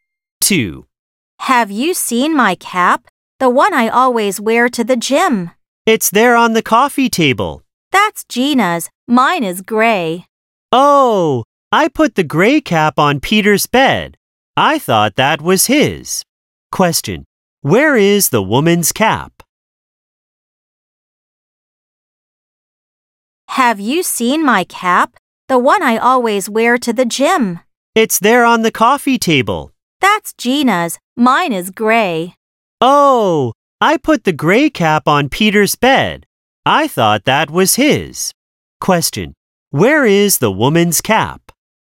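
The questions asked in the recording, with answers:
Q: Where is the woman's cap?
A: On Peter's bed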